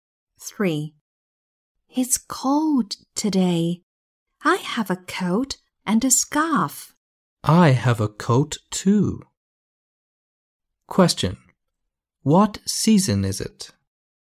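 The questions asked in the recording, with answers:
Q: What season is it?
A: winter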